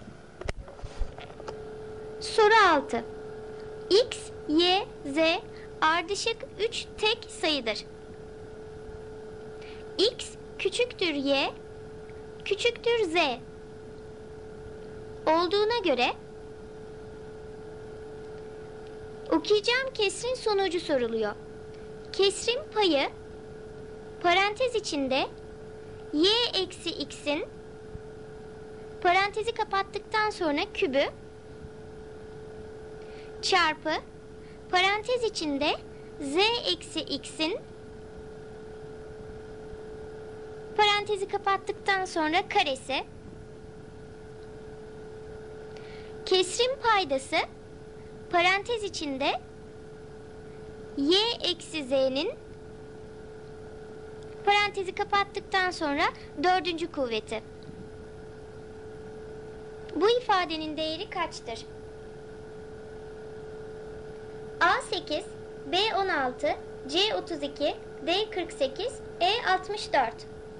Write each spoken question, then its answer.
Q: Bu ifadenin değeri kaçtır?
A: Doğru cevap A 8.